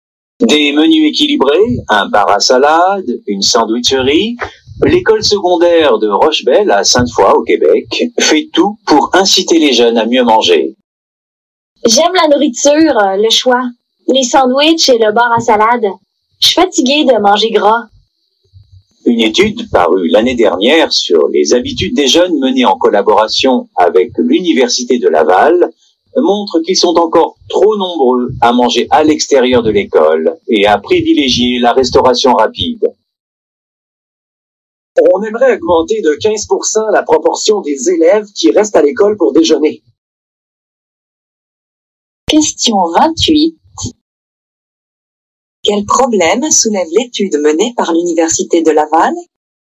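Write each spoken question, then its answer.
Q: Quel problème soulève l'étude menée par l'Université de Laval?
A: Trop de jeunes mangent à l'extérieur de l'école et privilégient la restauration rapide.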